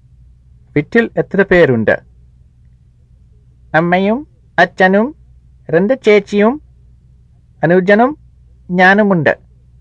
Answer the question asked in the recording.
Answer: ആറ് പേരുണ്ട്.